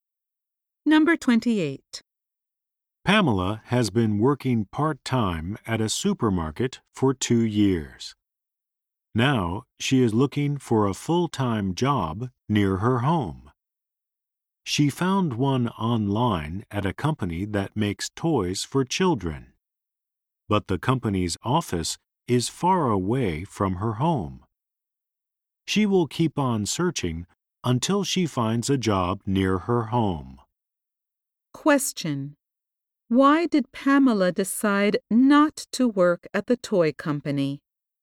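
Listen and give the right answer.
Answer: Its office is far from her home.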